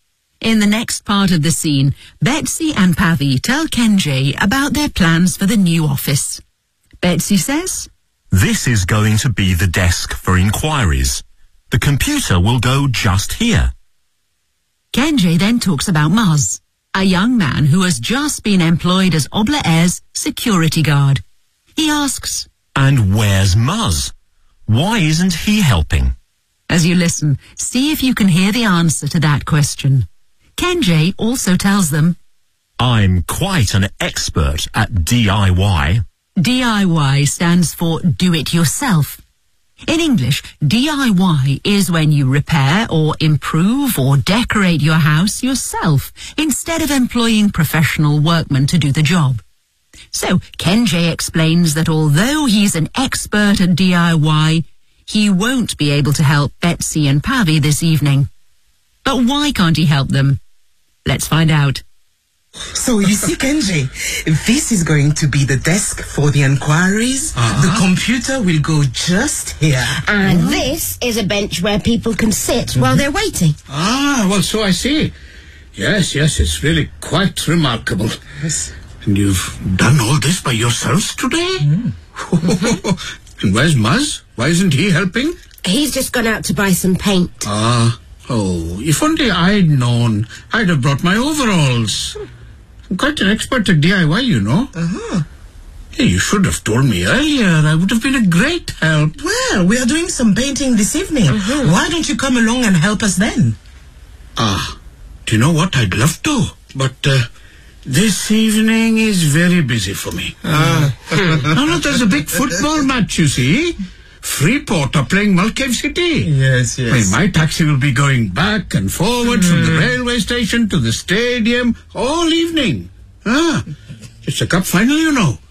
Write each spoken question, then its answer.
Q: And where's Maz?Why isn't he helping?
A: He's gone out to buy some paint.

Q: But why can't he help them?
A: this evening is very busy for me.